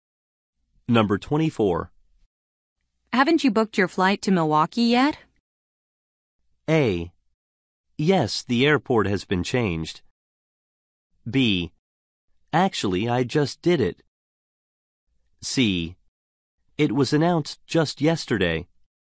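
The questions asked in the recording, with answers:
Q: Haven't you booked your flight to Milwaukee yet?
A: B: Actually, I just did it.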